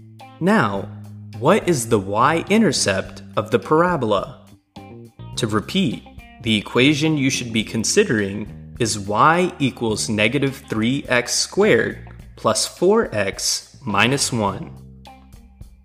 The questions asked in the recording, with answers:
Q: Now, what is the y-intercept of the parabola?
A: The y-intercept is negative 1